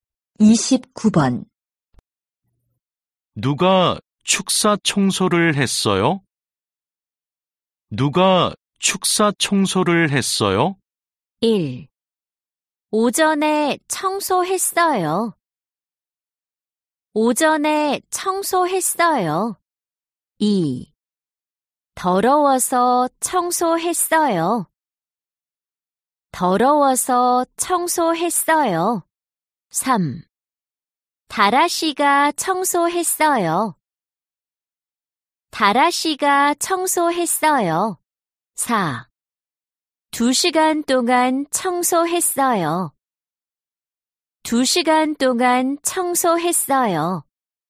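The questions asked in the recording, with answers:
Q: 누가 축사 청소를 했어요?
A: 3: 다라 씨가 청소했어요.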